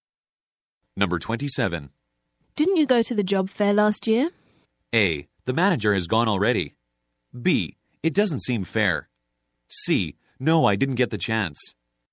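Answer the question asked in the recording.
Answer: C: No, I didn't get the chance.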